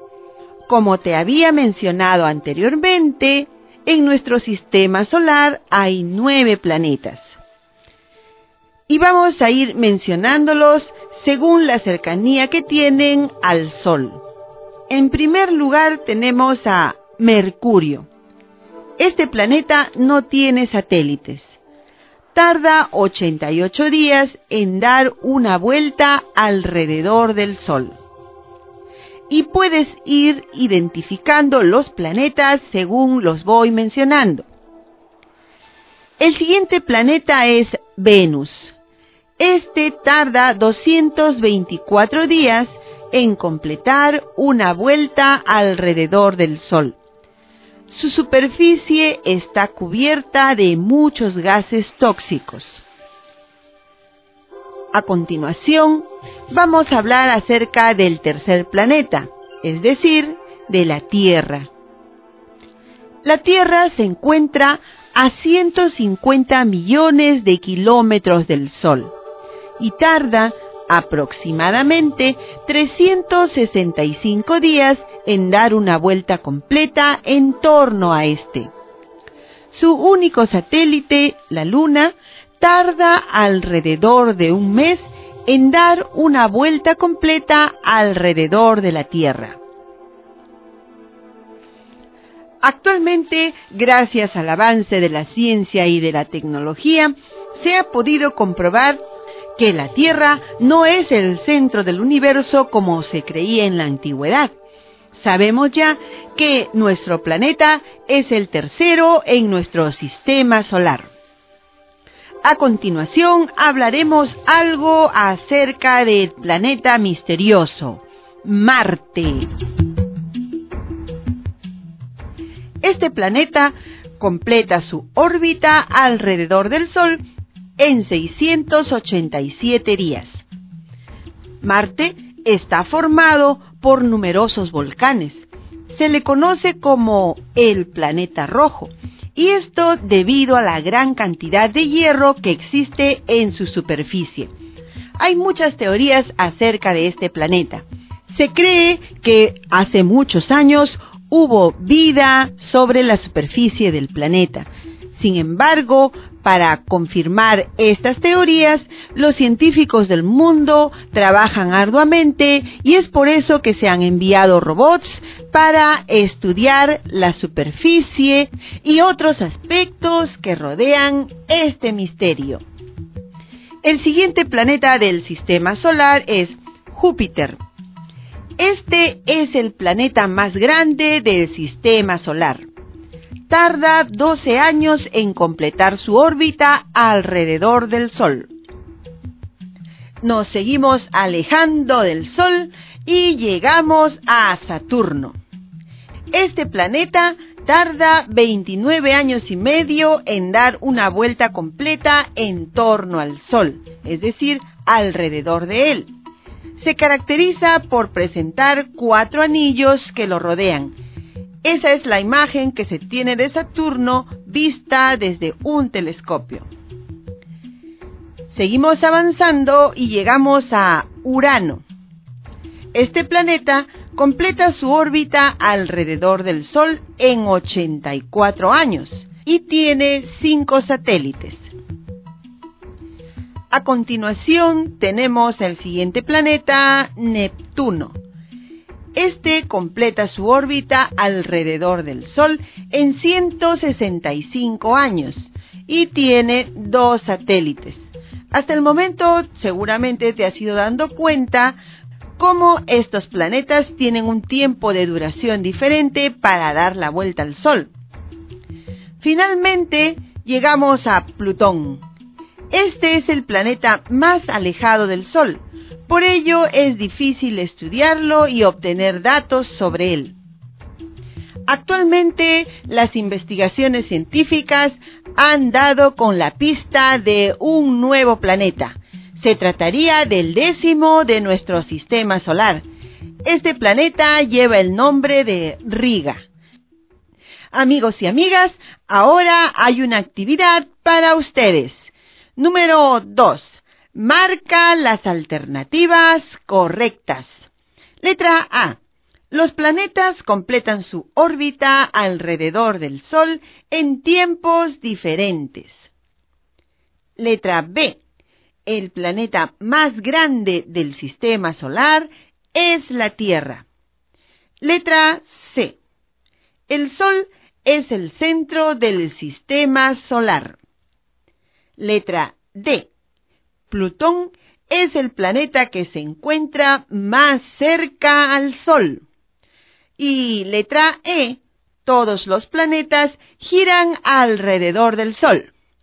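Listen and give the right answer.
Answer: A: Los planetas completan su órbita alrededor del Sol en tiempos diferentes; C: El Sol es el centro del sistema solar; E: todos los planetas giran alrededor del Sol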